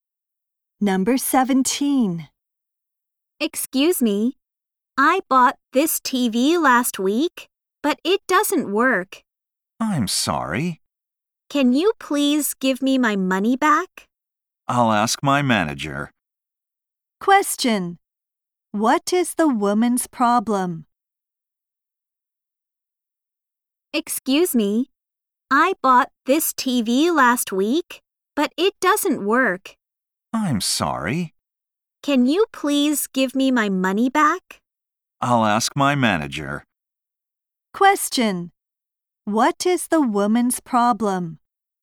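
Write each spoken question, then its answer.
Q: What is the woman's problem?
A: Her new TV doesn't work.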